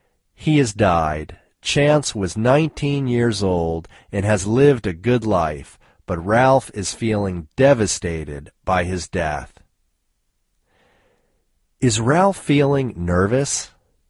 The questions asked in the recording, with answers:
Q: Is Ralph feeling nervous?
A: No, Ralph isn't feeling nervous.